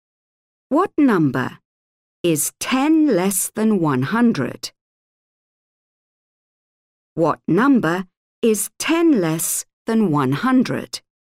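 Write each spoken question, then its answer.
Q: What number is 10 less than 100?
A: 90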